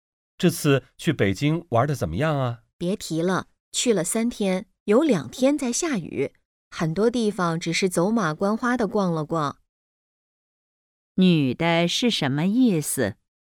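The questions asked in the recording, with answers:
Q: 女的是什么意思?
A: 玩得不好,因为下雨没能好好游览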